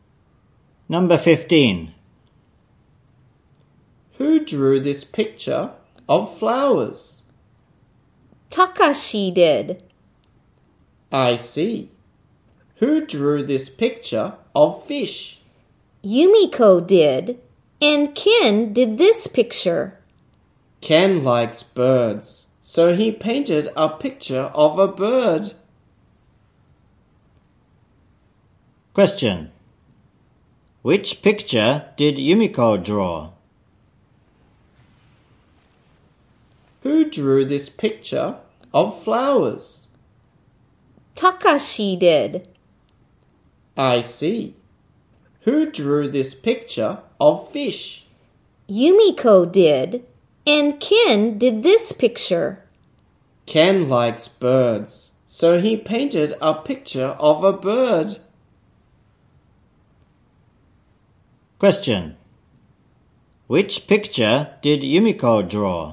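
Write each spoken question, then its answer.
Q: Question. Which picture did Yumiko draw?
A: The picture of fish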